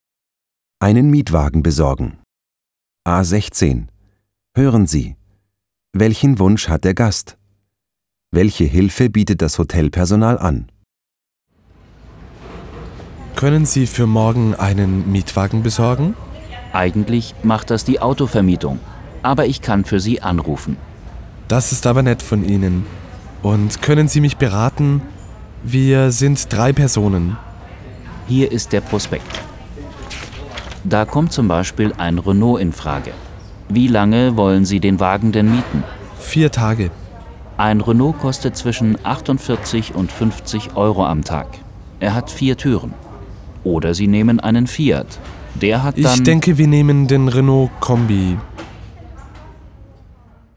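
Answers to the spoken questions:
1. Er möchte für morgen einen Mietwagen.
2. Es ruft für ihn bei der Autovermietung an und berät ihn.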